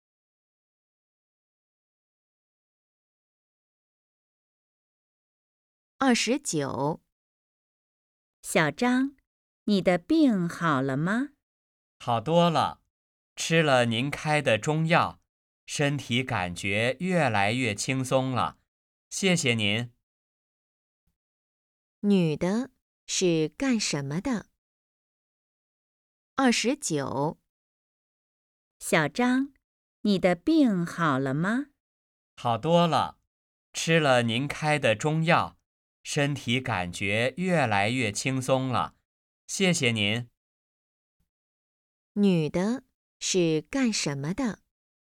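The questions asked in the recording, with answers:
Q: 女的是干什么的?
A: 医生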